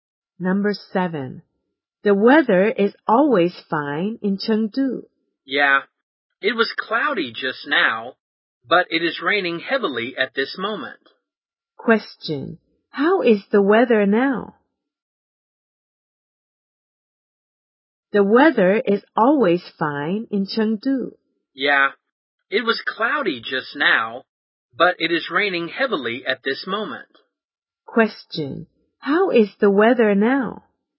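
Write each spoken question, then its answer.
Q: How is the weather now?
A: Rainy (raining heavily)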